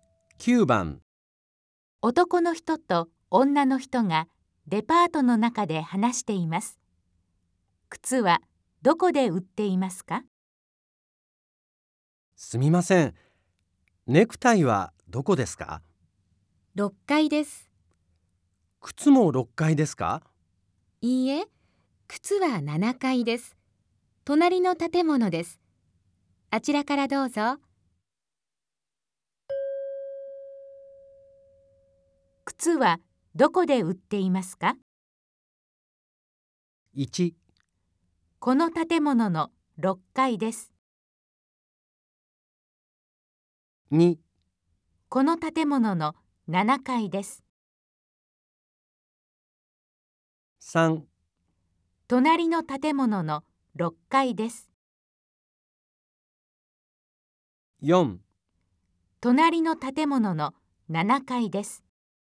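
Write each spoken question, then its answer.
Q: 靴はどこで売っていますか?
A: 4: 隣の建物の7階です。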